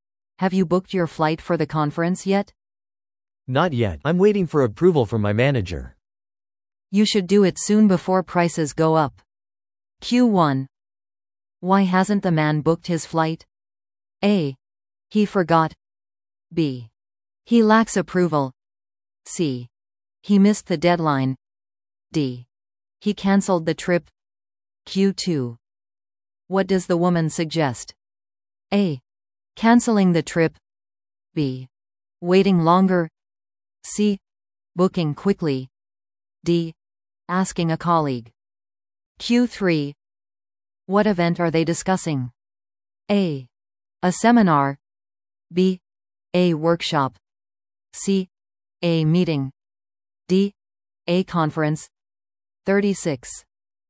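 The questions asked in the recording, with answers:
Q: Why hasn't the man booked his flight?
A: B: He lacks approval.

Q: What does the woman suggest?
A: C: Booking quickly.

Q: What event are they discussing?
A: D: A conference.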